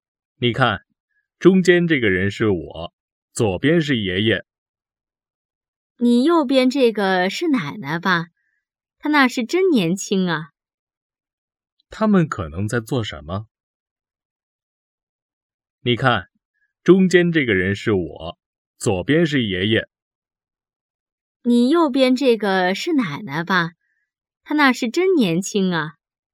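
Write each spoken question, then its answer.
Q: 他们可能在做什么?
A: 看照片

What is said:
男:你看,中间这个人是我,左边是爷爷。
女:你右边这个是奶奶吧,她那时真年轻啊。
问:他们可能在做什么?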